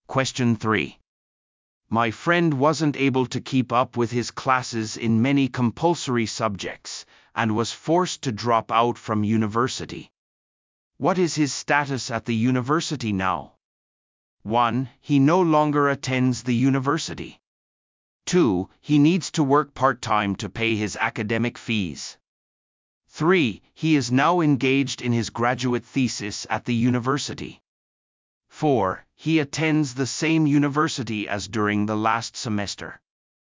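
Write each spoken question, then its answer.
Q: What is his status at the university now?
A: 1: He no longer attends the university.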